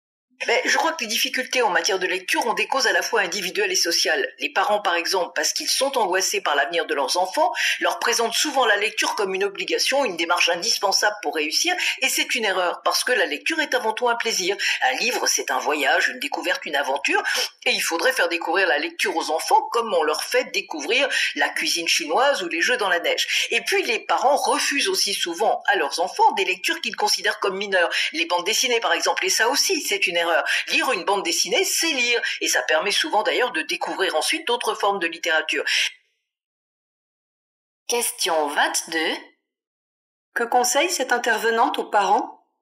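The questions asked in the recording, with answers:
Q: Que conseille cette intervenante aux parents ?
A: Présenter la lecture comme un plaisir et accepter des lectures comme les bandes dessinées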